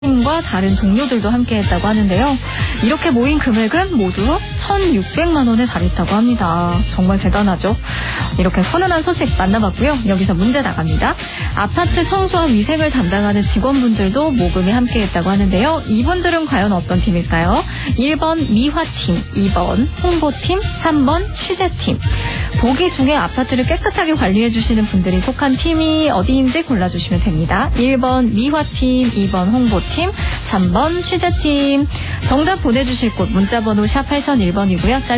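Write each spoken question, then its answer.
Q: 이분들은 과연 어떤 팀일까요?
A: 1번: 미화팀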